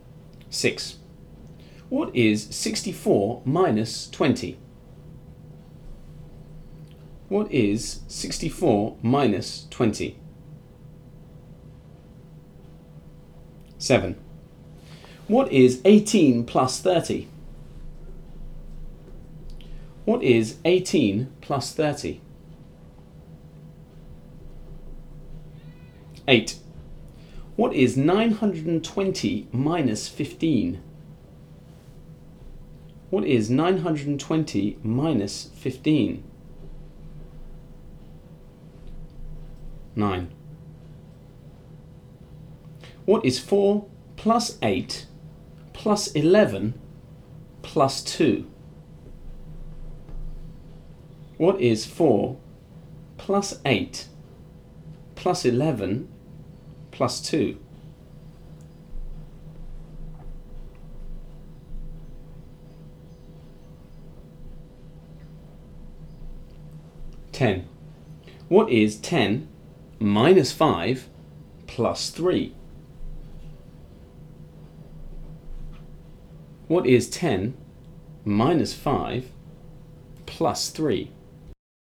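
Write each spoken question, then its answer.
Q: What is 64 minus 20?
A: 44

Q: What is 18 plus 30?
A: 48

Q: What is 920 minus 15?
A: 905

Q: What is 4 plus 8 plus 11 plus 2?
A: 25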